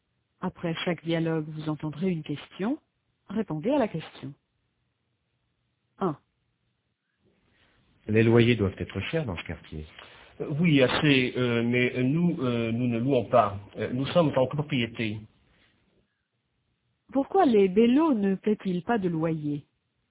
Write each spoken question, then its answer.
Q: Pourquoi les bellos ne paient-ils pas de loyer?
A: Parce qu'ils sont en copropriété.